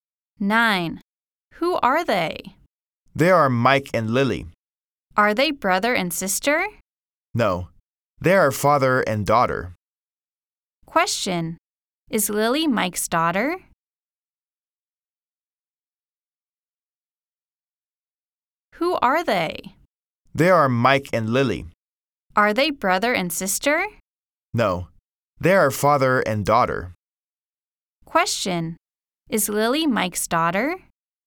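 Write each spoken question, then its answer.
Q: Question. Is Lily Mike's daughter?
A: Yes, she is.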